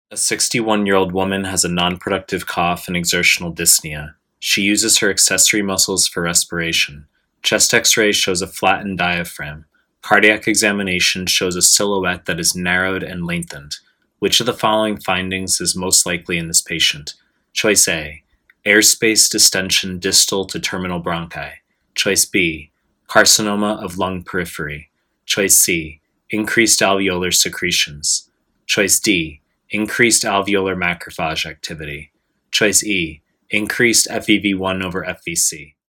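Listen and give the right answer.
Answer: A: airspace distension distal to terminal bronchi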